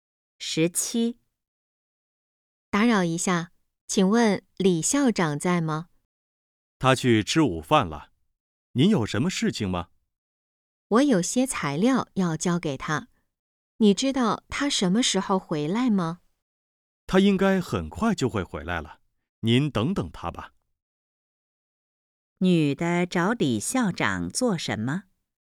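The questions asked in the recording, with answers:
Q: 女的找李校长做什么?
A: 交材料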